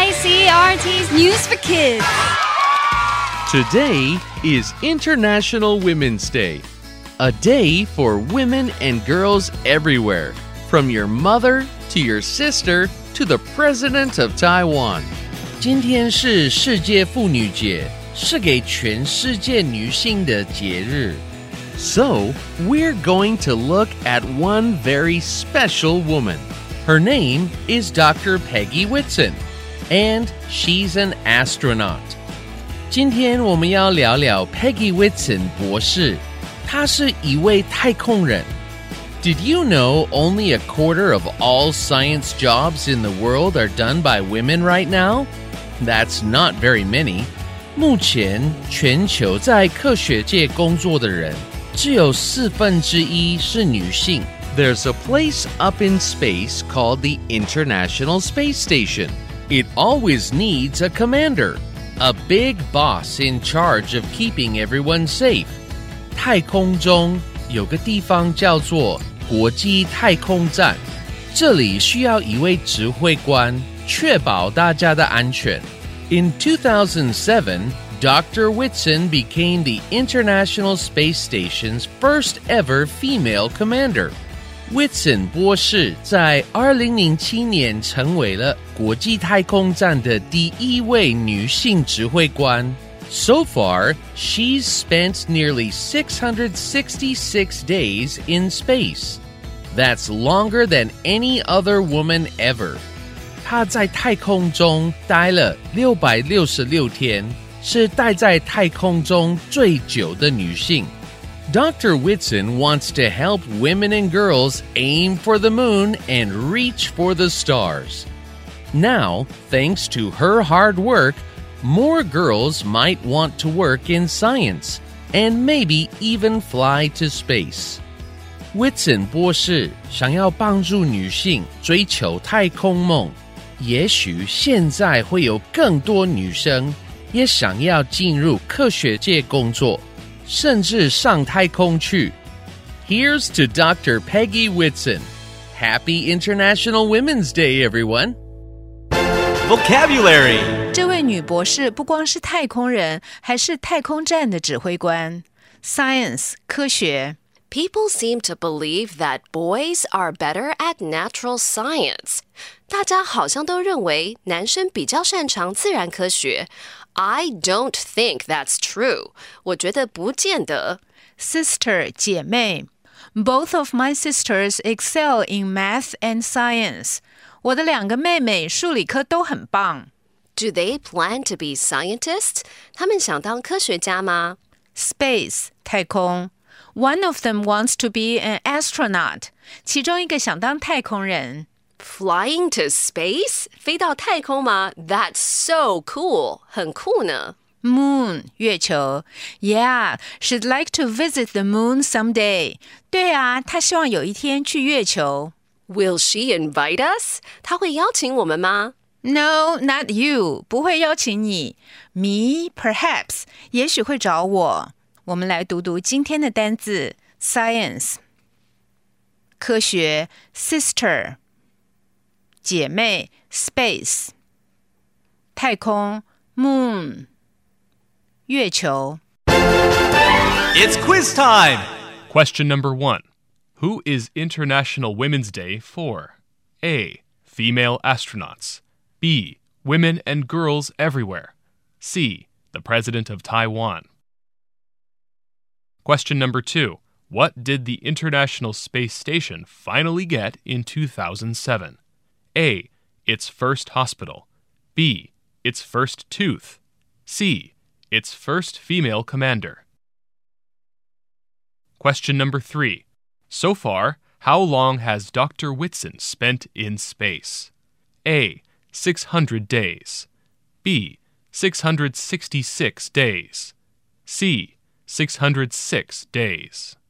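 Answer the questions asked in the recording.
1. B: Women and girls everywhere.
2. C: Its first female commander.
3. B: 666 days.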